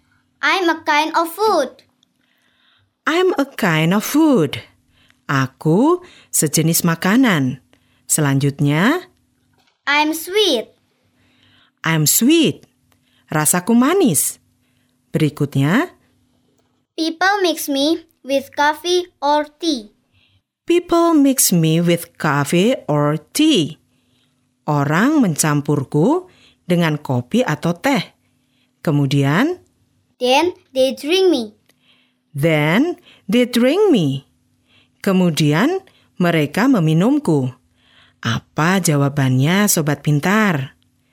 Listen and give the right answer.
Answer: Benar sekali. Jawabannya adalah gula atau sugar.